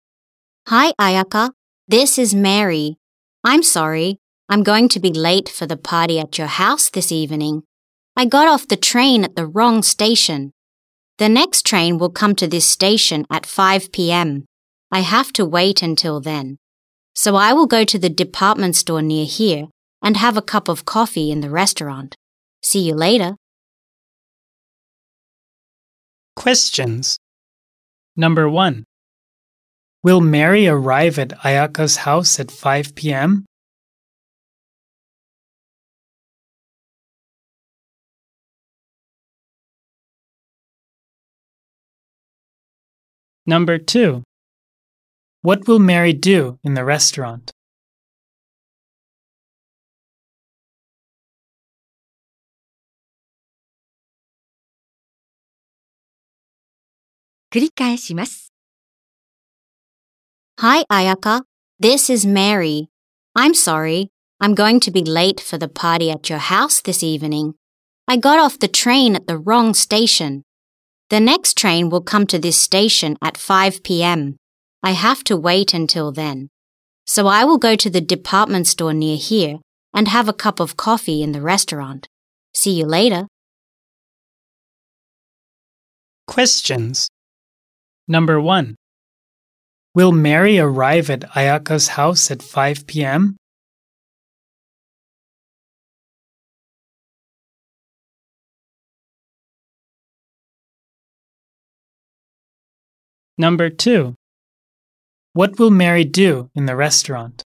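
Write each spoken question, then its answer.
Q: Will Mary arrive at Ayaka's house at 5 p.m.?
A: No, she won't

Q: What will Mary do in the restaurant?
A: She will have a cup of coffee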